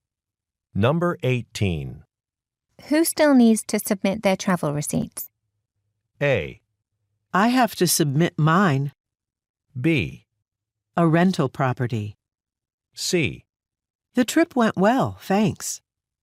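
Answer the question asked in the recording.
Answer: A: I have to submit mine.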